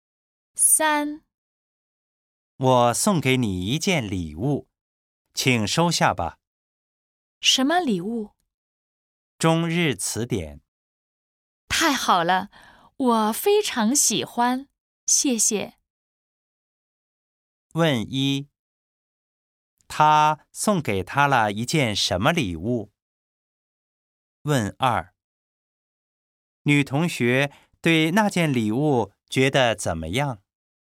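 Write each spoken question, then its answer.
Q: 他送给他了一件什么礼物?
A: 中日词典

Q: 女同学对那件礼物觉得怎么样?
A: 非常喜欢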